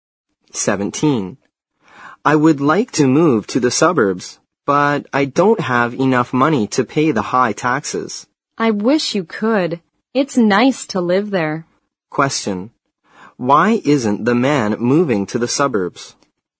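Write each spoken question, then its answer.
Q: Why isn't the man moving to the suburbs?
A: He doesn't have enough money to pay the high taxes.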